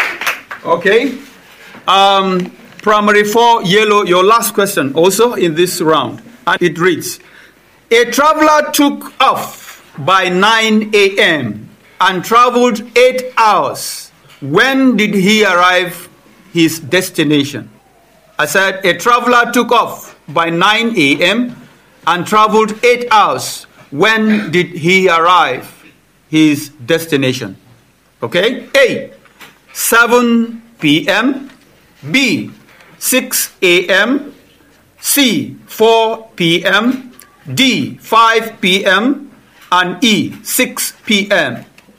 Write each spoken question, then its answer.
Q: When did he arrive his destination?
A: D, 5 p.m.